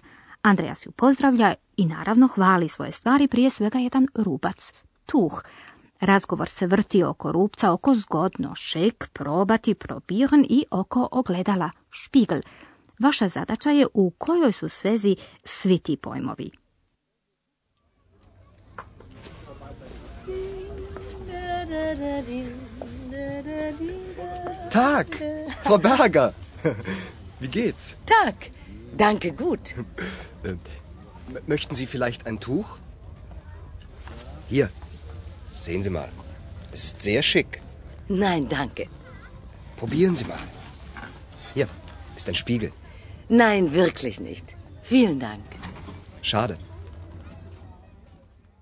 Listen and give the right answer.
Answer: Andreas hvali Rubac da je zgodan, Želi nagovoriti gospođu Berger da ga još jednom proba te da se pogleda u ogledalo.